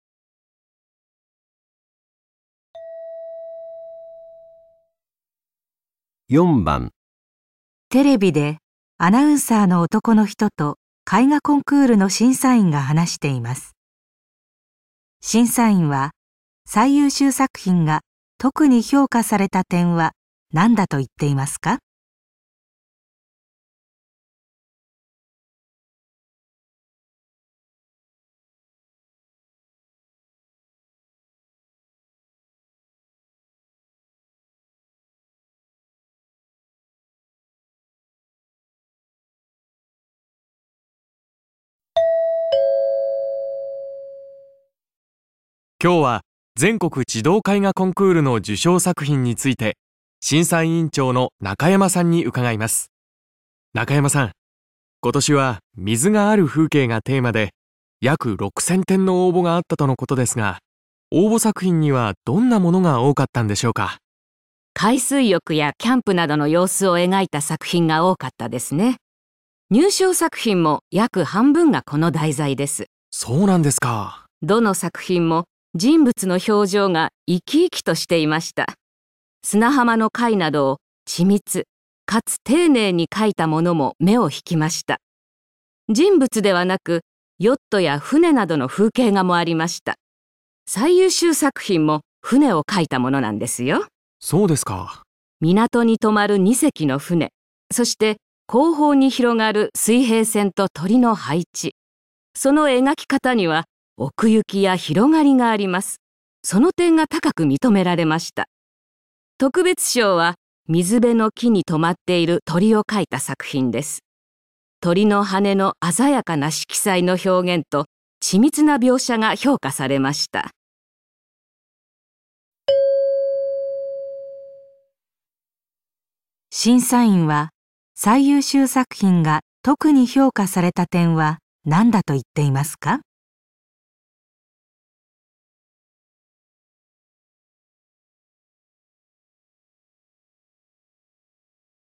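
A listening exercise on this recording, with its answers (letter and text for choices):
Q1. 4番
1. 人物の表情が生き生きとえがかれている点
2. 細部がていねいに書かれている点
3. 風景におくゆきや広がりが感じられる点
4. 鮮やかな色使いで表現されている点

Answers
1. 3. 風景におくゆきや広がりが感じられる点

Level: N1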